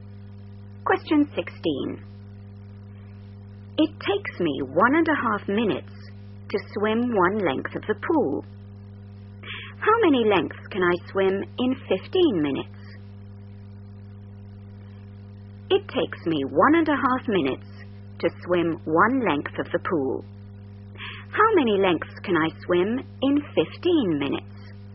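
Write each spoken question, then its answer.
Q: How many lengths can I swim in 15 minutes?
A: 10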